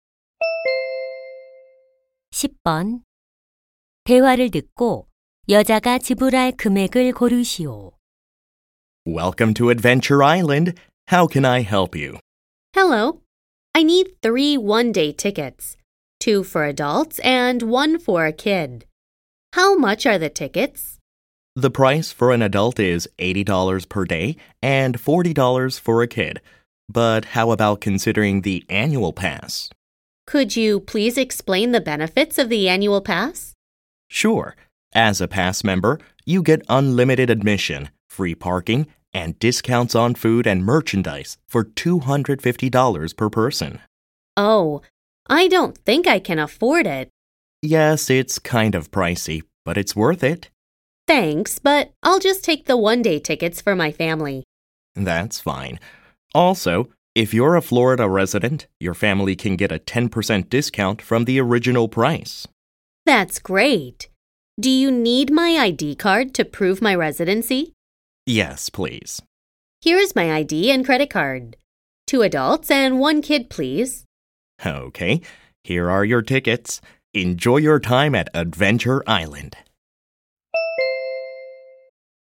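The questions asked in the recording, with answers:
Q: 대화를 듣고 여자가 지불할 금액을 고르시오.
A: $180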